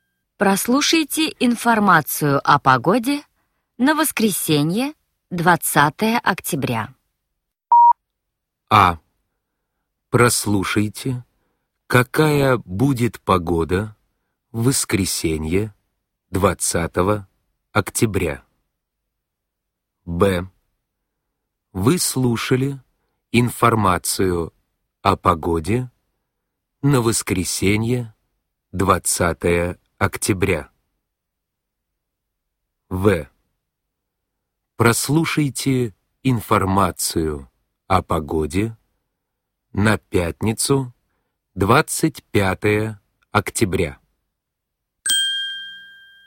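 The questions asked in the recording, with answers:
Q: Прослушайте информацию о погоде на воскресенье, 20 октября.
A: А: Прослушайте, какая будет погода в воскресенье, 20 октября.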